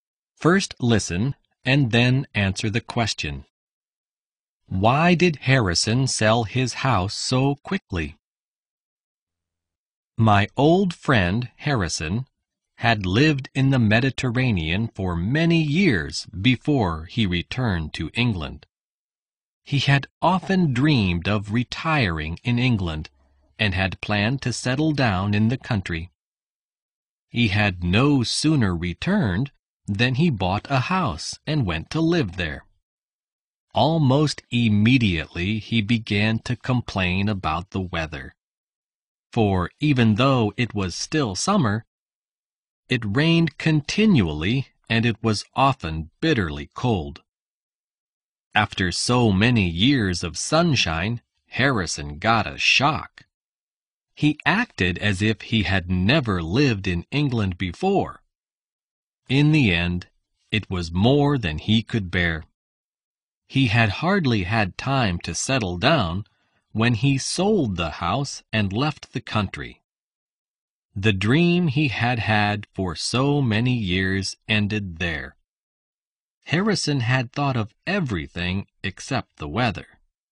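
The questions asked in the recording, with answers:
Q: Why did Harrison sell his house so quickly?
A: Because he couldn't bear the English weather: it rained continually and was often bitterly cold.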